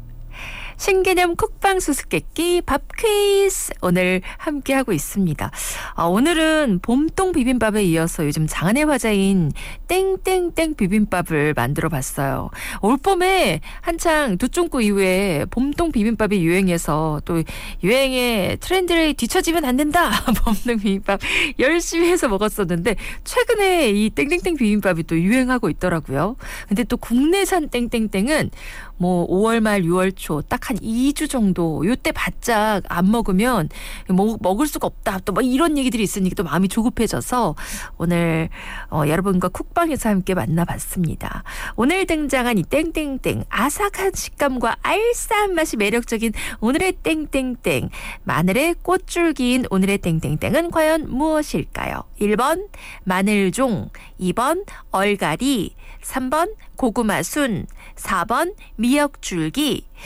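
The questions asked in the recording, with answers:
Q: 오늘 등장한 이 땡땡땡 아삭한 식감과 알싸한 맛이 매력적인 오늘의 땡땡땡 마늘의 꽃줄기인 오늘의 땡땡땡은 과연 무엇일까요?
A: 1: 마늘종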